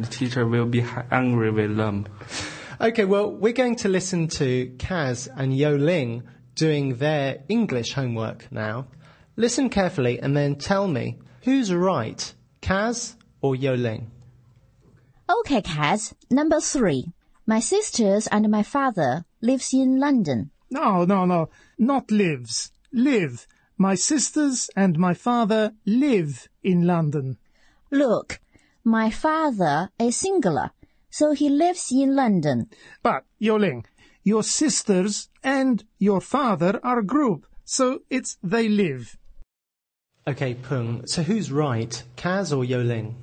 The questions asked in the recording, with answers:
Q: Okay, Peng, so who's right, Kaz or Yo Ling?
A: Kaz is right, and so are you.